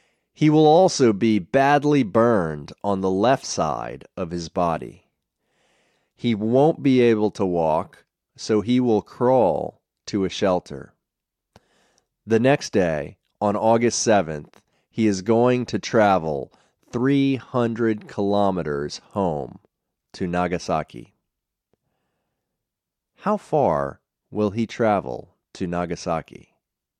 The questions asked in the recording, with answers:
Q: How far will he travel to Nagasaki?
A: He will travel 300 kilometers to Nagasaki.